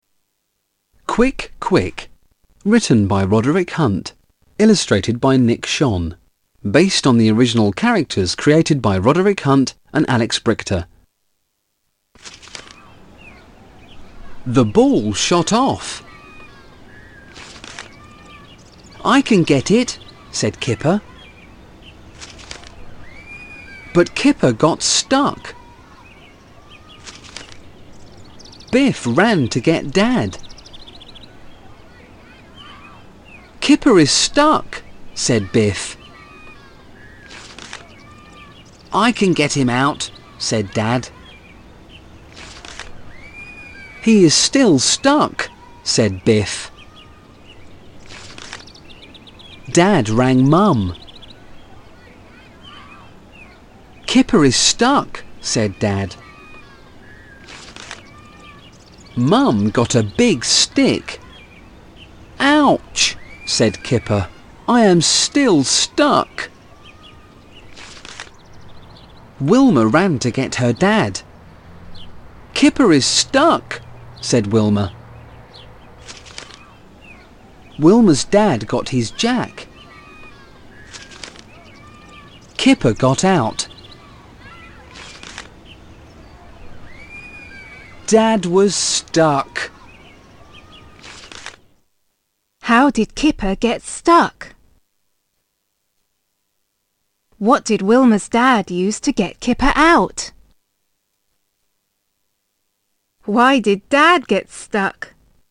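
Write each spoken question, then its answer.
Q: What did Wilma's dad use to get Kipper out?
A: His jack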